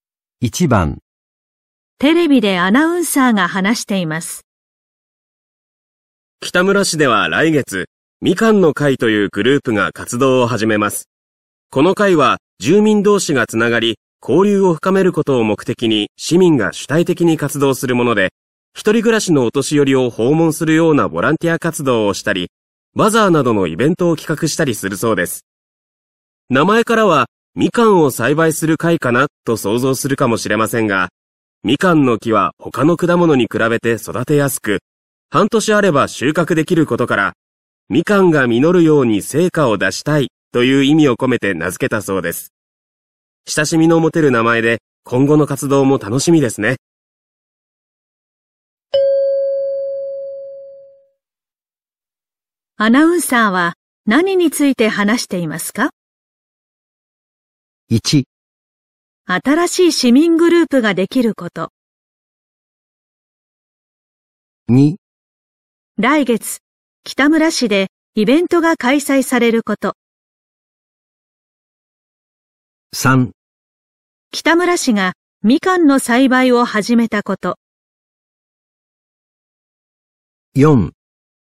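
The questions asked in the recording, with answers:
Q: アナウンサーは何について話していますか?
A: 1: 新しい市民グループができること。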